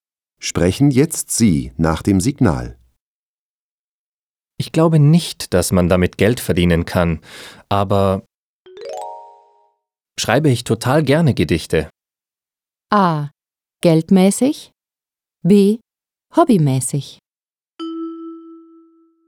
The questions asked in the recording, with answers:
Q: Ich glaube nicht, dass man damit Geld verdienen kann, aber schreibe ich total gerne Gedichte.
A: B. Hobbymäßig.